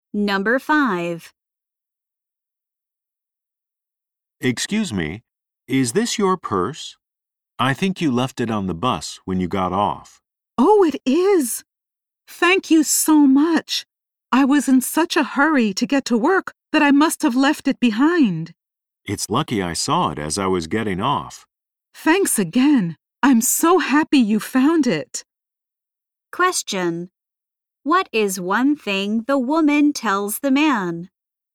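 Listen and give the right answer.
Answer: She was in a hurry to get to work.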